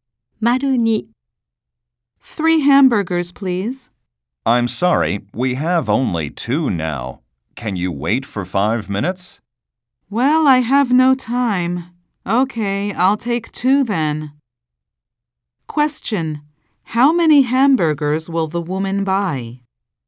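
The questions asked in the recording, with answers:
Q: How many hamburgers will the woman buy?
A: Two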